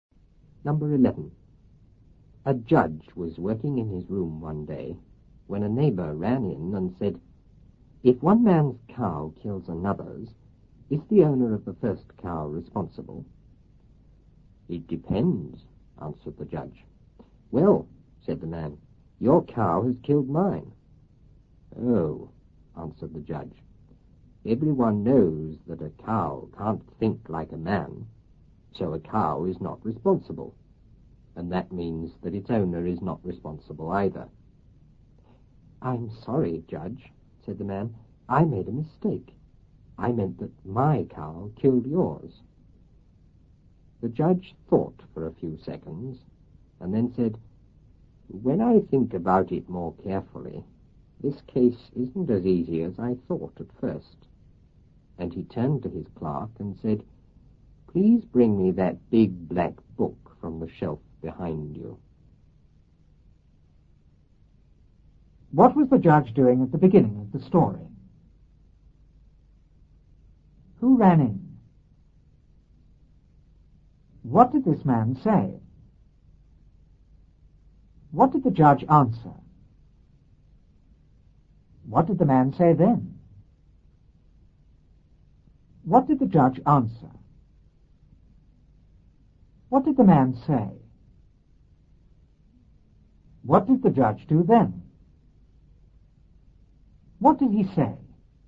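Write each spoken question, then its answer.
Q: What was the judge doing at the beginning of the story?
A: Working in his room

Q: Who ran in?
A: A neighbor

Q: What did this man say?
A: If one man's cow kills another's, is the owner of the first cow responsible?

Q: What did the judge answer?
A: It depends

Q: What did the man say then?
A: Your cow has killed mine

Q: What did the judge answer?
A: A cow can't think like a man, so neither the cow nor its owner is responsible

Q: What did the man say?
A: He made a mistake; his cow killed the judge's

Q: What did the judge do then?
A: Thought for a few seconds

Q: What did he say?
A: The case isn't as easy as he thought; he asked his clerk for the big black book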